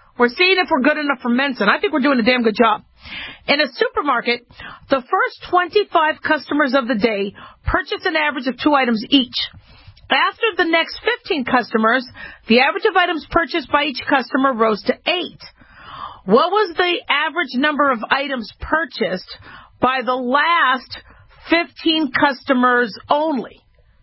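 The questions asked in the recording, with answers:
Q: What was the average number of items purchased by the last 15 customers only?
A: 18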